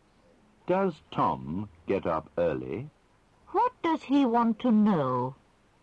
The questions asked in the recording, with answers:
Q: What does he want to know?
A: He wants to know if Tom gets up early.